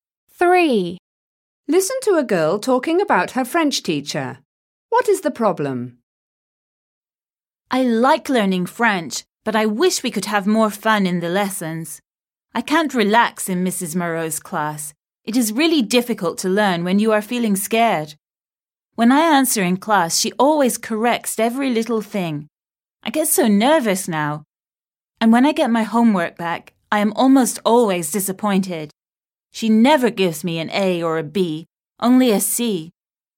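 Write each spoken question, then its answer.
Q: What is the problem?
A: The teacher is too strict and makes her nervous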